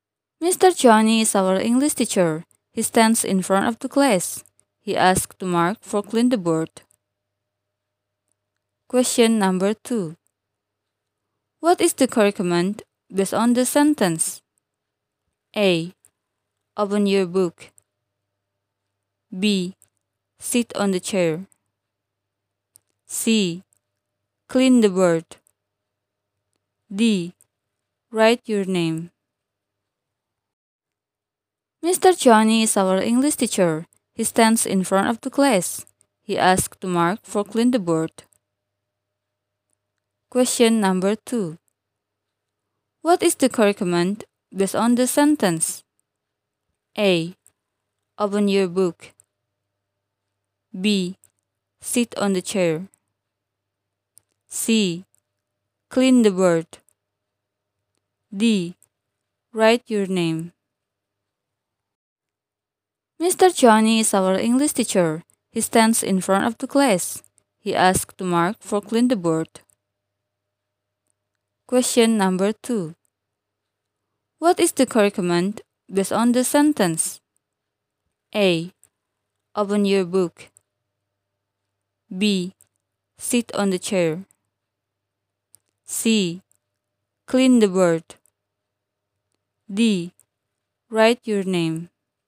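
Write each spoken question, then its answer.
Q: What is the curriculum based on the sentence?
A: C: Clean the board.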